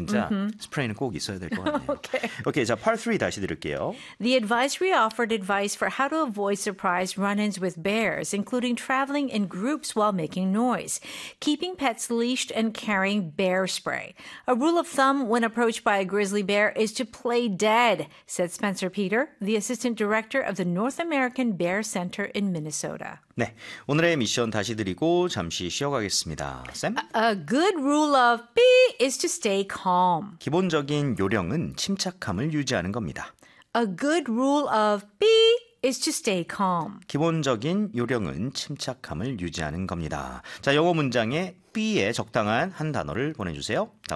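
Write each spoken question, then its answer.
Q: A good rule of B is to stay calm. 기본적인 요령은 침착함을 유지하는 겁니다. 자, 영어 문장에 B에 적당한 한 단어를 보내주세요.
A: thumb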